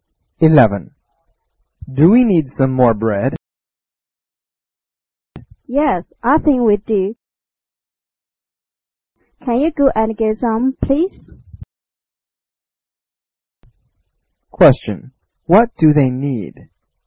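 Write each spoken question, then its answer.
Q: What do they need?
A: Some more bread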